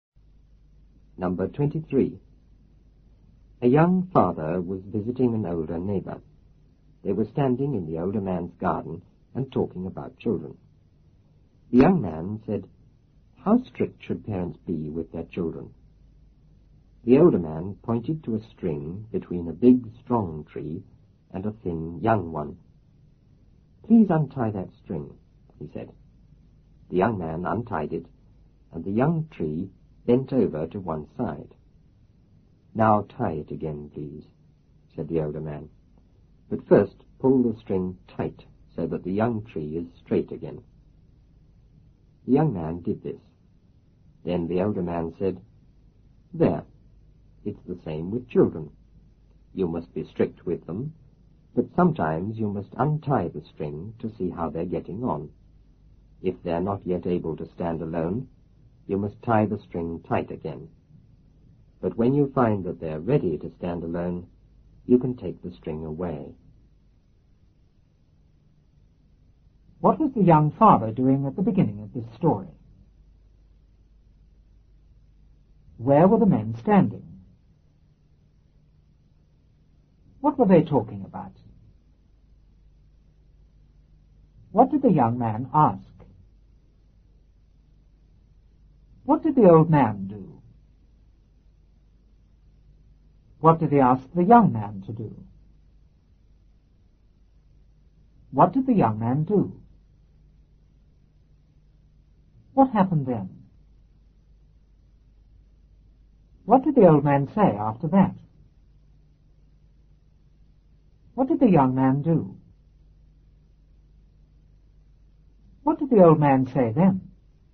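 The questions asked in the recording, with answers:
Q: What was the young father doing at the beginning of this story?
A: Visiting an older neighbor

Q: Where were the men standing?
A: In the older man's garden

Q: What were they talking about?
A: Children

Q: What did the young man ask?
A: How strict parents should be with their children

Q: What did the old man do?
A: He pointed to a string between a big, strong tree and a thin, young one

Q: What did he ask the young man to do?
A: Untie the string

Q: What did the young man do?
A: He untied it

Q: What happened then?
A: The young tree bent over to one side

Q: What did the old man say after that?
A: Tie it again, but first pull the string tight so the young tree is straight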